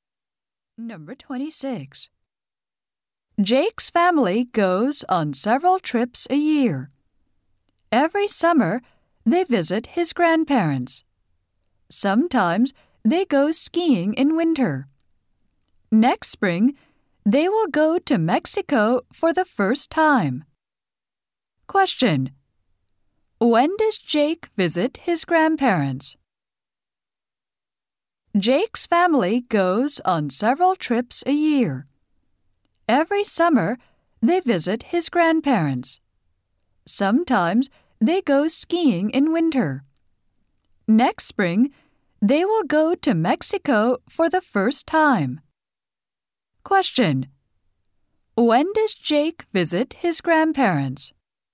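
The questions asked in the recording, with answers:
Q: When does Jake visit his grandparents?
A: Every summer.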